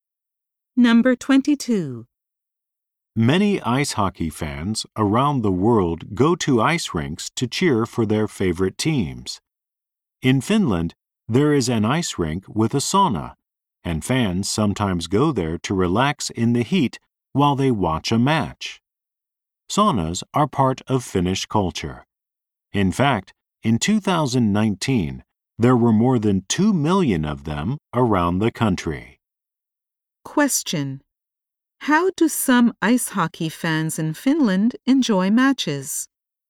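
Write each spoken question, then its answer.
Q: How do some ice hockey fans in Finland enjoy matches?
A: They relax in a sauna at the ice rink while watching.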